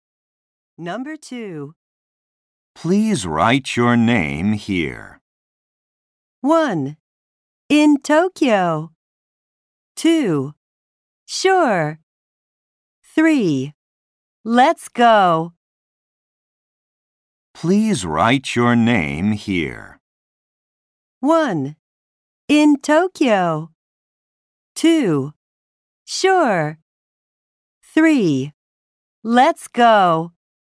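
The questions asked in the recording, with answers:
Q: Please write your name here.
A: 2: Sure.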